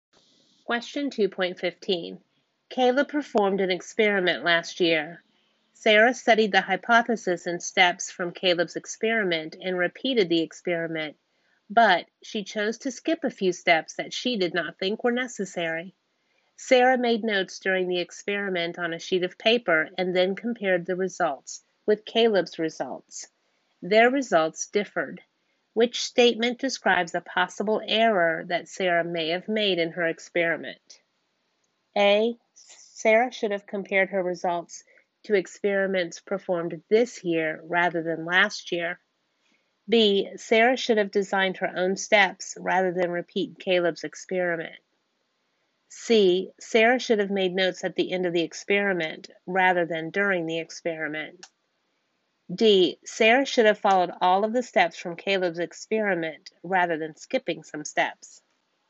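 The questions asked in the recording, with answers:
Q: Which statement describes a possible error that Sarah may have made in her experiment?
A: D: Sarah should have followed all of the steps from Caleb's experiment rather than skipping some steps.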